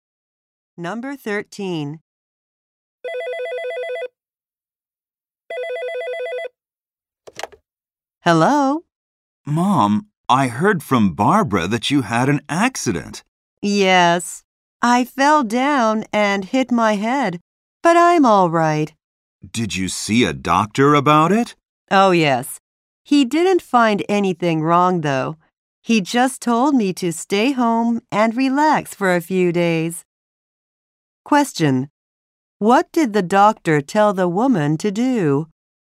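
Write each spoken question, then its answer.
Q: What did the doctor tell the woman to do?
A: Stay home and relax for a few days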